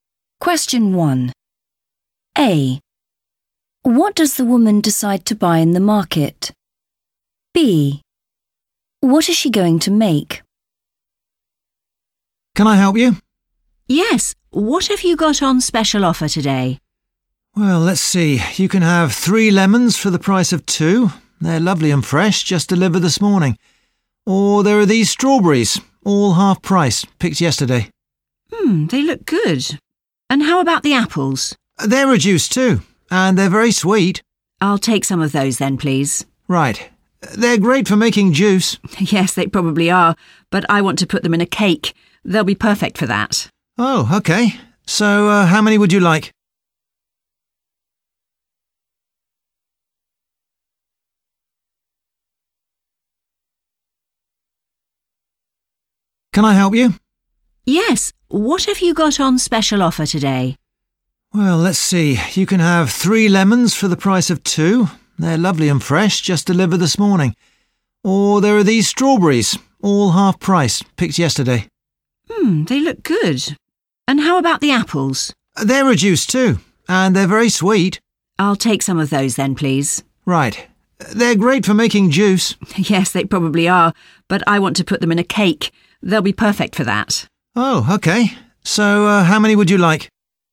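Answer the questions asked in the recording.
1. apples
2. a cake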